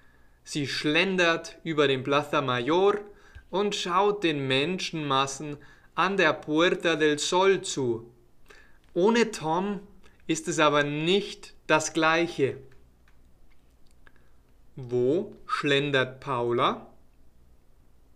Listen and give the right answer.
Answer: Über den Plaza Mayor. Sie schlendet über den Plaza Mayor.